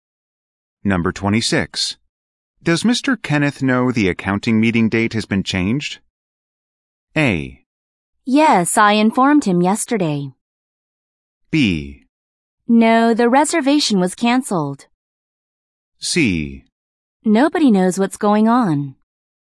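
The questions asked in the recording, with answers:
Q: Does Mr. Kenneth know the accounting meeting date has been changed?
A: A: Yes, I informed him yesterday.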